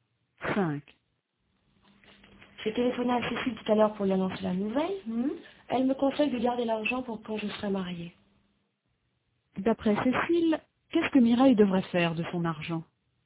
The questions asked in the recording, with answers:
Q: D'après Cécile, qu'est-ce que Mireille devrait faire de son argent ?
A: Elle devrait le garder pour quand elle sera mariée.